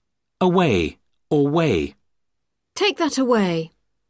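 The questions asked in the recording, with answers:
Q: Away or way.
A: away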